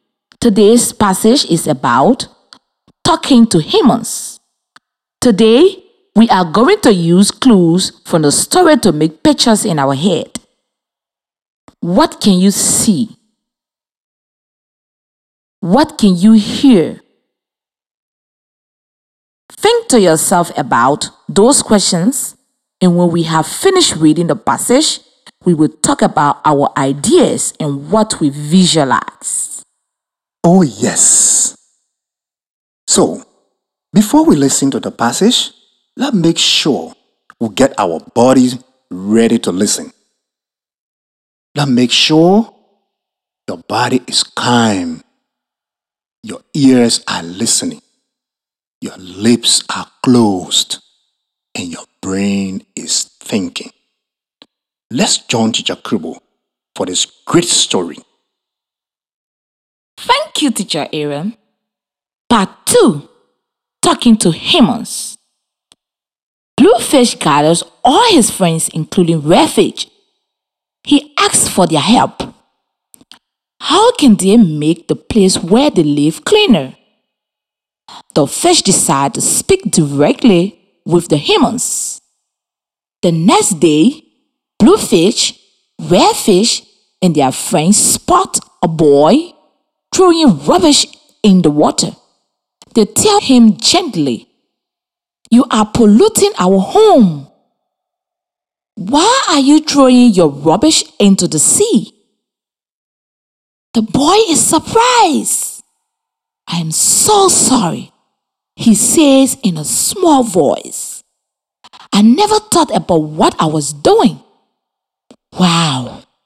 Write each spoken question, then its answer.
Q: What can you see?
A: you can see a boy polluting the water by throwing his rubbish into the sea

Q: What can you hear?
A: you must be able to hear a conversation between the fish and the boy